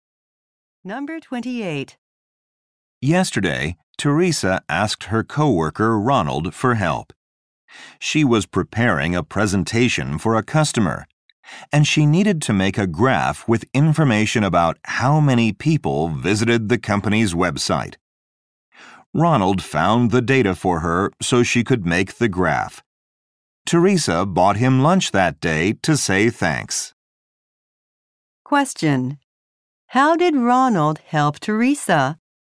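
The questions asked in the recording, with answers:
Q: How did Ronald help Teresa?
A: He found data for her graph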